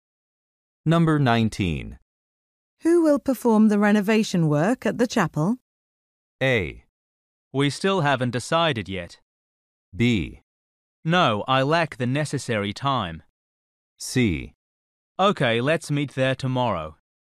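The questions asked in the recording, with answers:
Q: Who will perform the renovation work at the chapel?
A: A: We still haven't decided yet.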